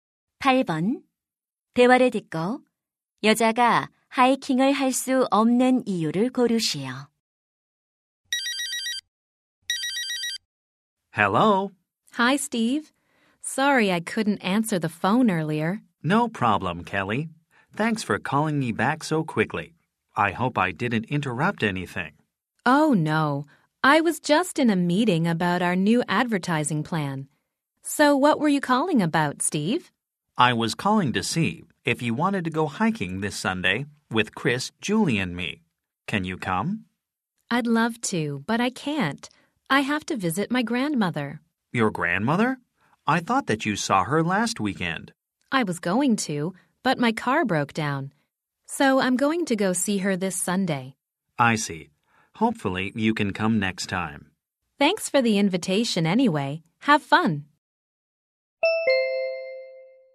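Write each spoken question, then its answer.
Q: 대화를 듣고 여자가 하이킹을 할 수 없는 이유를 고르시오.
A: 할머니를 방문해야 해서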